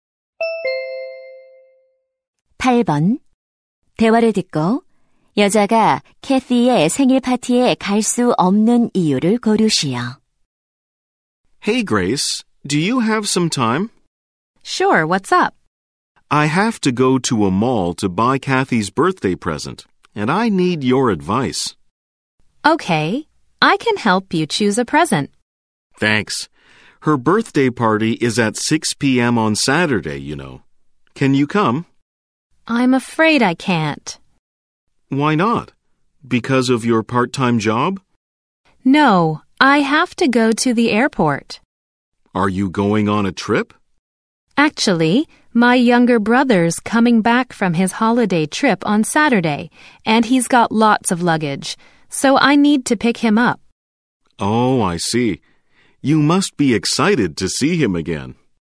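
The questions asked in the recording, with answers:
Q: 대화를 듣고 여자가 캐티의 생일 파티에 갈 수 없는 이유를 고르시오.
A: 남동생을 데리러 공항에 가야 해서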